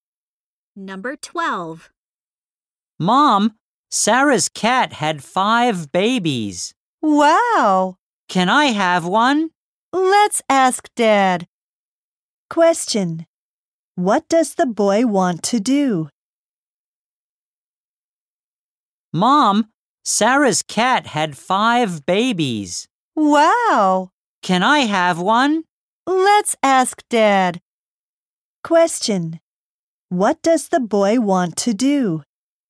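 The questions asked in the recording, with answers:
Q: Question: What does the boy want to do?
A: Have one of the kittens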